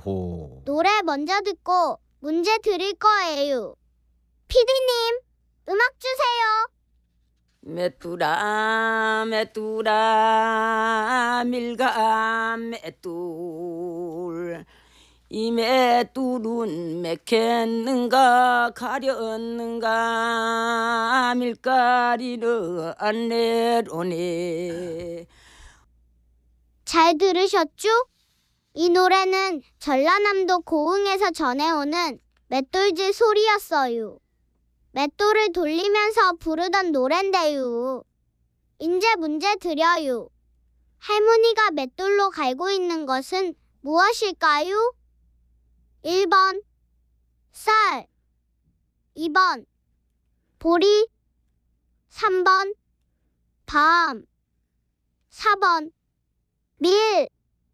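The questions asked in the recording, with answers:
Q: 할머니가 맷돌로 갈고 있는 것은 무엇일까요? 1번 쌀, 2번 보리, 3번 밤, 4번 밀.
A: 4번: 밀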